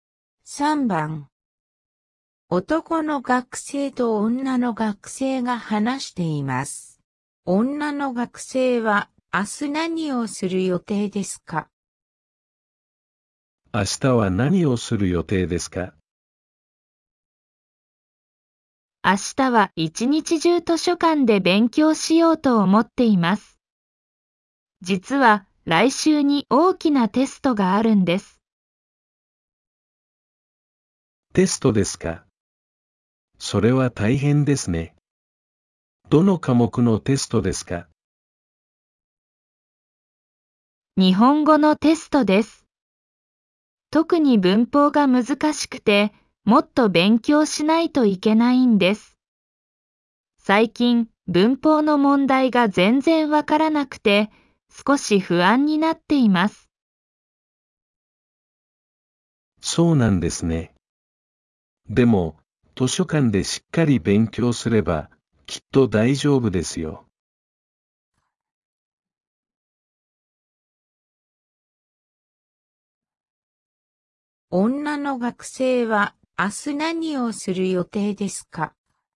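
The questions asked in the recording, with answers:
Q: 女の学生は明日何をする予定ですか?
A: 一日中図書館で勉強する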